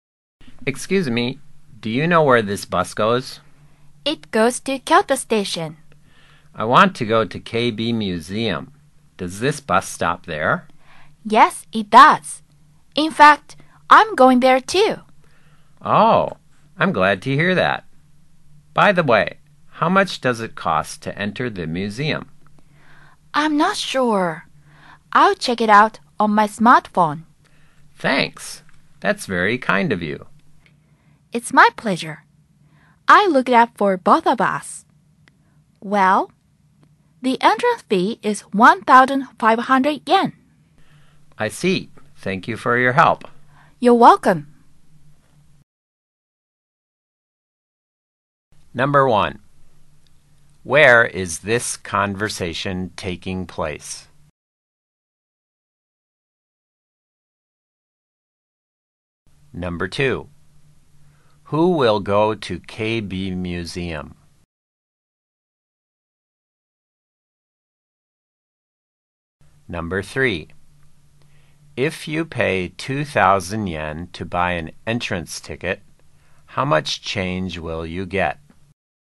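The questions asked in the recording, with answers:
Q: Number 2. Who will go to KB Museum?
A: Both of them

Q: Number 3. If you pay 2,000 yen to buy an entrance ticket, how much change will you get?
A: 500 yen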